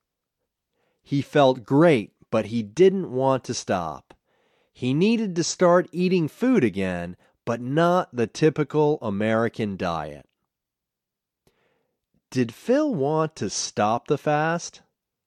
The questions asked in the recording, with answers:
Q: Did Phil want to stop the fast?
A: No, Phil didn't want to stop the fast.